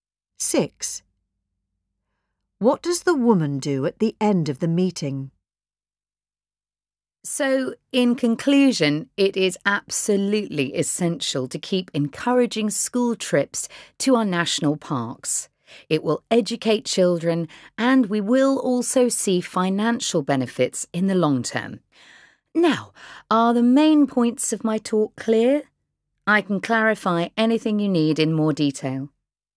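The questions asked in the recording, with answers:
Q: What does the woman do at the end of the meeting?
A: She checks whether her main points are clear and offers to explain anything in more detail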